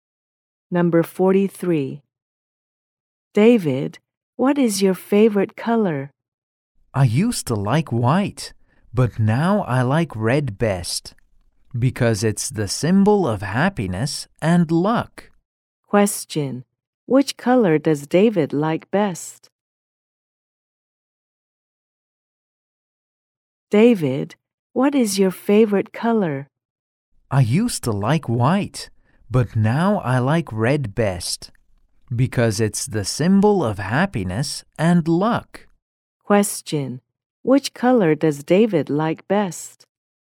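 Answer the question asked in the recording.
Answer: Red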